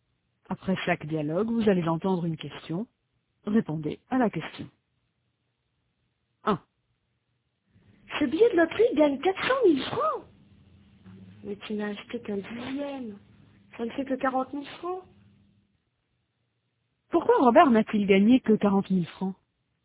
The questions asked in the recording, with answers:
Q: Pourquoi Robert n'a-t-il gagné que 40 000 francs?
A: Parce qu'il n'a acheté qu'un dixième.